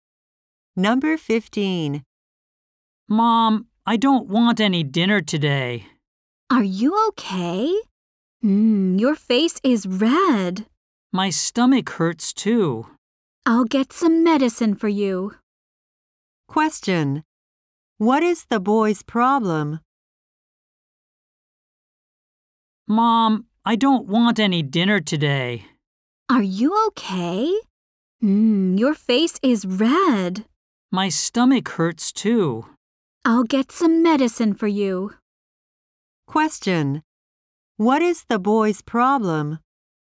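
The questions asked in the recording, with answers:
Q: What is the boy's problem?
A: He is sick; his stomach hurts.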